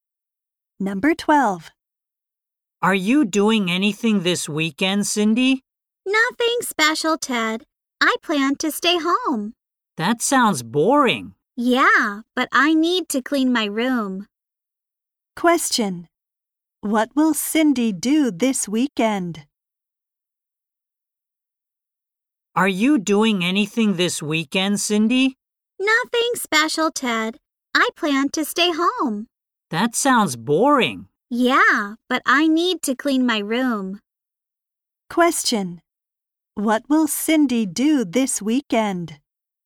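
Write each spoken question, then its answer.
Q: What will Cindy do this weekend?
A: Stay home and clean her room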